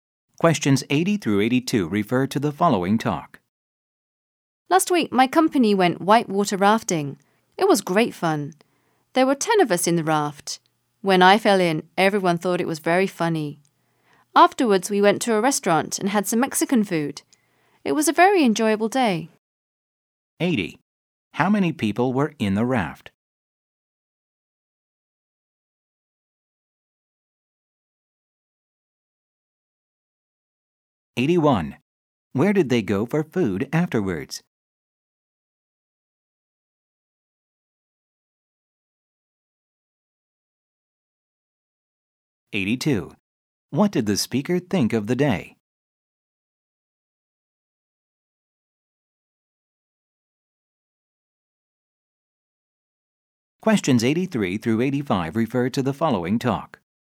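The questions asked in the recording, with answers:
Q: How many people were in the raft?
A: 10

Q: Where did they go for food afterwards?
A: A Mexican restaurant

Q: What did the speaker think of the day?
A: It was very enjoyable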